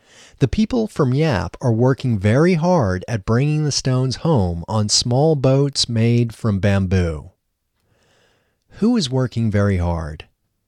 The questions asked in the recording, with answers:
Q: Who is working very hard?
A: The people of Yap are working very hard.